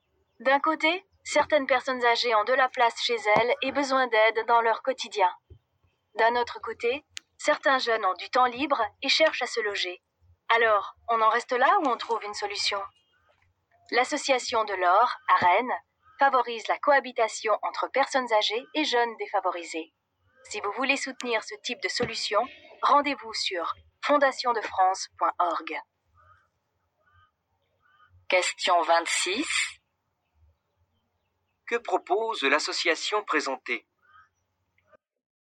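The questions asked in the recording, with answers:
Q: Que propose l'association présentée ?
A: La cohabitation entre personnes âgées et jeunes défavorisés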